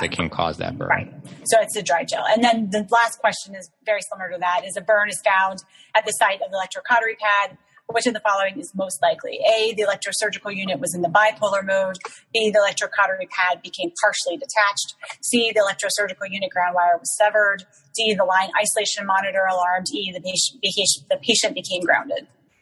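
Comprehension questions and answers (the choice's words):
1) Burn found at site of Bovie pad. Which of following most likely?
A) ESU in bipolar mode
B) Pad partially detached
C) ESU line severed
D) LIM alarm that patient became grounded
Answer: Pad partially detached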